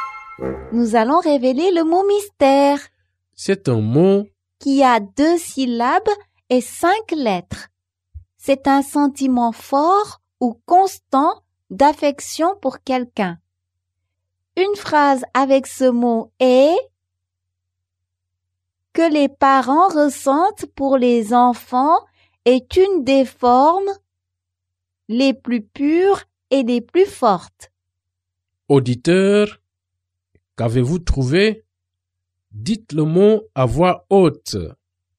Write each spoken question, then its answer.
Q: Auditeur, qu'avez-vous trouvé?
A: Le mot mystère est amour.